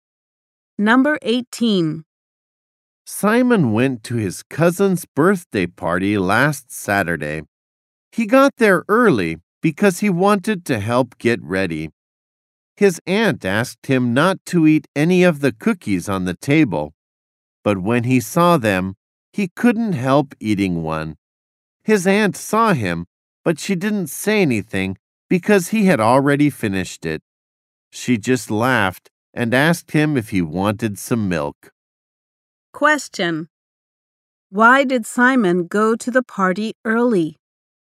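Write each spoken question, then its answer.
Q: Question: Why did Simon go to the party early?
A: To help get ready.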